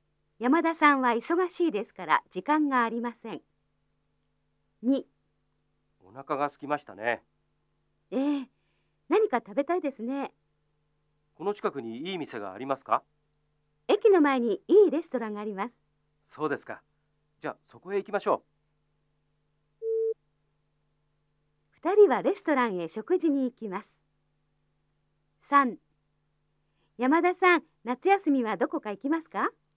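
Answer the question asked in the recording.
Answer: 正しい(○)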